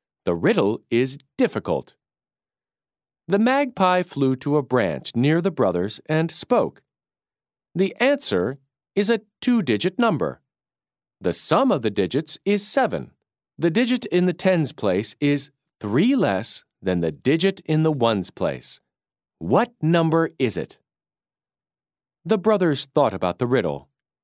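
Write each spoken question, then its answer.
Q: What number is it?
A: 25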